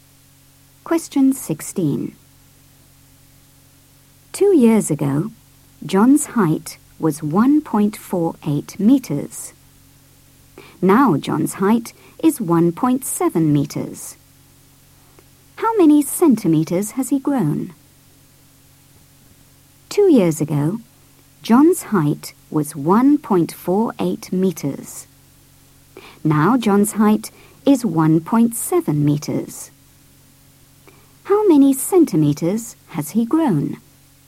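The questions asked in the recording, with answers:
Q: How many centimeters has he grown?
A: 22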